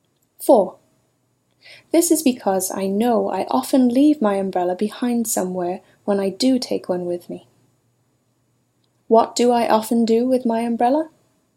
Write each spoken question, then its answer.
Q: What do I often do with my umbrella?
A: You often leave your umbrella behind somewhere when you do take one with you.